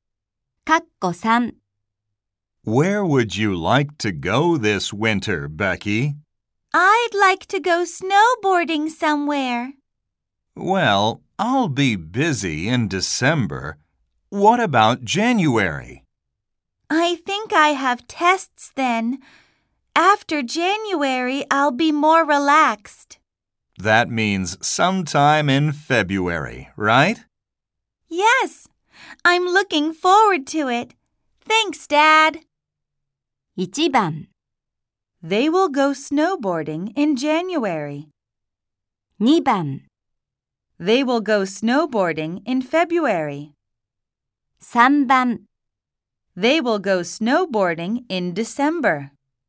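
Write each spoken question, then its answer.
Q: They will go snowboarding in February.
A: 2: They will go snowboarding in February.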